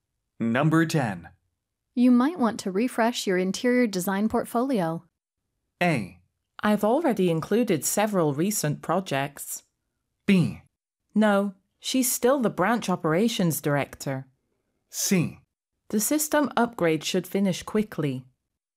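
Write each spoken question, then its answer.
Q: You might want to refresh your interior design portfolio.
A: A: I've already included several recent projects.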